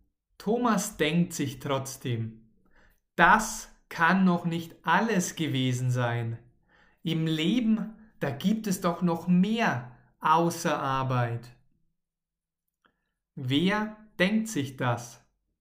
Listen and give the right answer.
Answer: Thomas. Thomas denkt sich das.